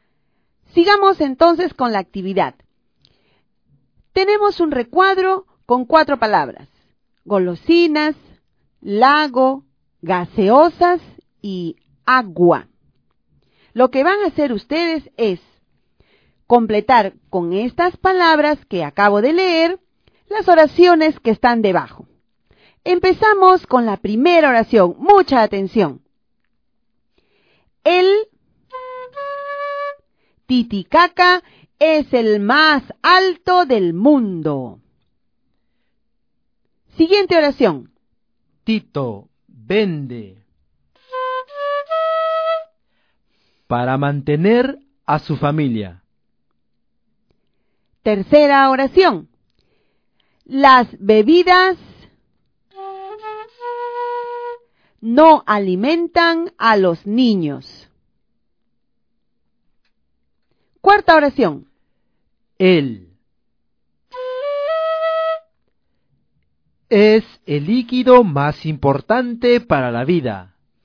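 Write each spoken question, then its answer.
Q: El Titicaca es el más alto del mundo.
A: lago

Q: Las bebidas no alimentan a los niños.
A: gaseosas

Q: es el líquido más importante para la vida.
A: agua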